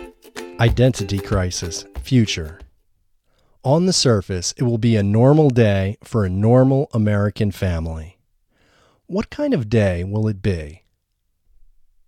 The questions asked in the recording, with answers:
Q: What kind of day will it be?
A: On the surface, it will be a normal day for a normal American family.